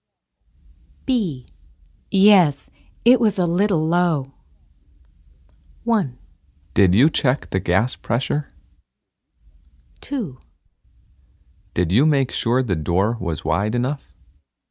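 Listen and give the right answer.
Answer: 1: Did you check the gas pressure?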